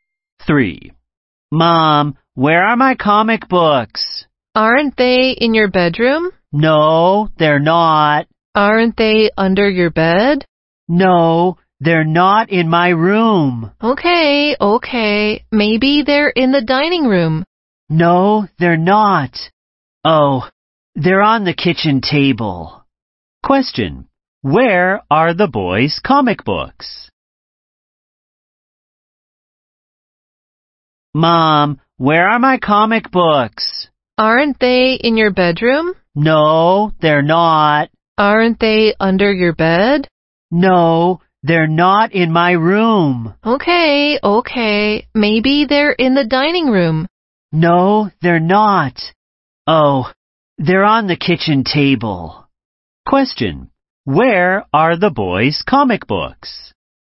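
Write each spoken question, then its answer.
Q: Where are the boys' comic books?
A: On the kitchen table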